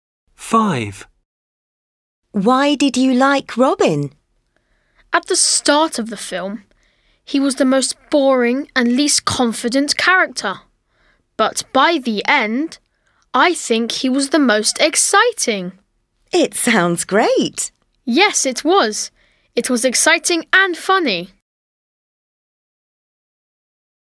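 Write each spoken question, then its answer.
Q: Why did you like Robin?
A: by the end he was the most exciting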